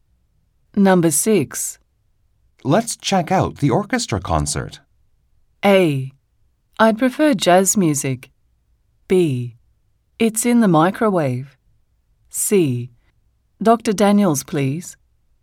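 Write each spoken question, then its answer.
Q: Let's check out the orchestra concert.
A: A: I'd prefer jazz music.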